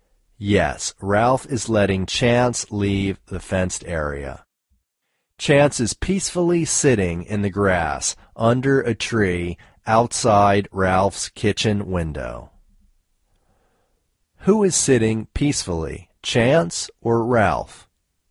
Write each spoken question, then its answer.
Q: Who is sitting peacefully, Chance or Ralph?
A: Chance is sitting peacefully.